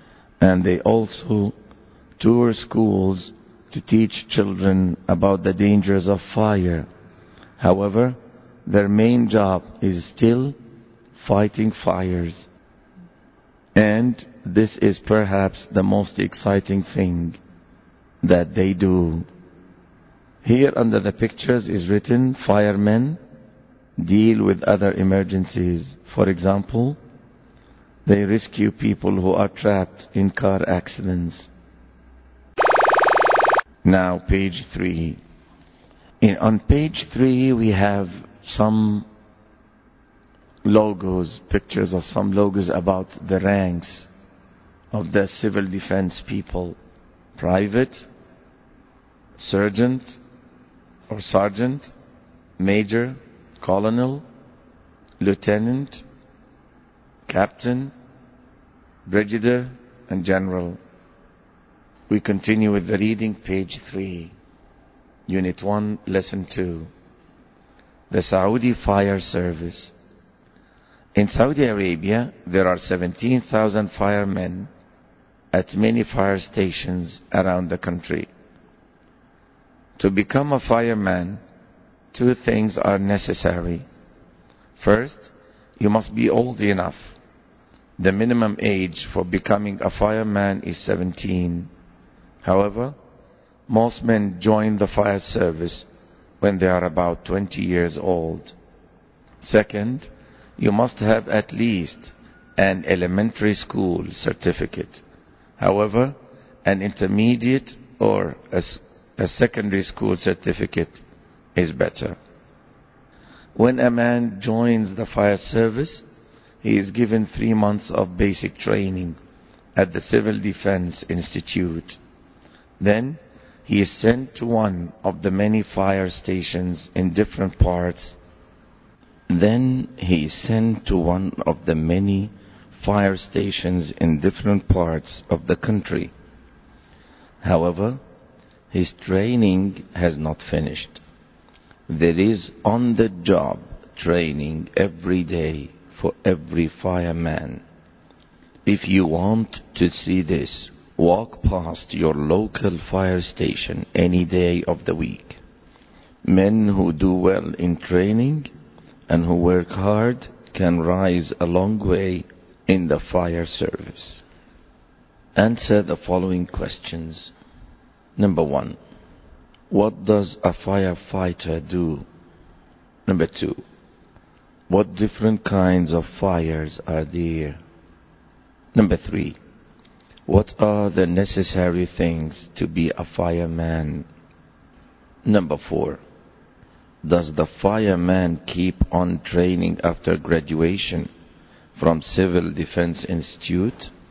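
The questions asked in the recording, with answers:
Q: what are the necessary things to be a fireman?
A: Be old enough (at least 17) and have at least an elementary school certificate

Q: does the fireman keep on training after graduation from Civil Defense Institute?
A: Yes, there is on-the-job training every day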